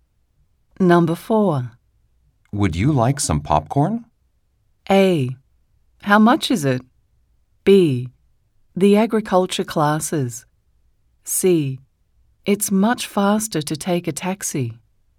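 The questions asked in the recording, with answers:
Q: Would you like some popcorn?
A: A: How much is it?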